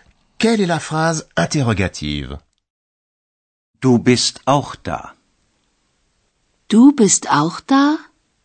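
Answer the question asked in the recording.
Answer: La deuxième : « Du bist auch da? » (avec la voix qui monte à la fin)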